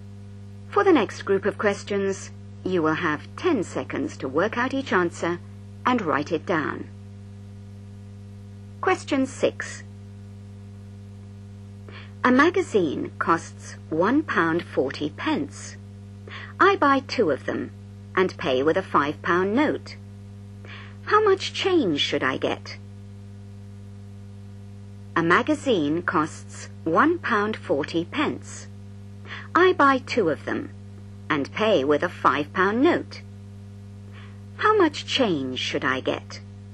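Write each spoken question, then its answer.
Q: How much change should I get?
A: £2.20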